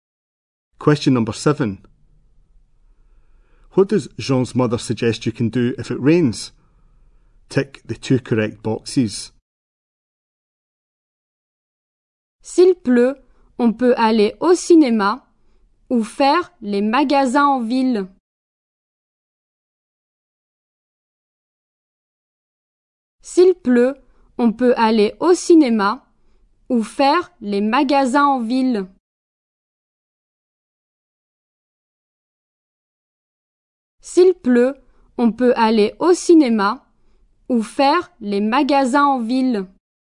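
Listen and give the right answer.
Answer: Go to the cinema or go shopping in town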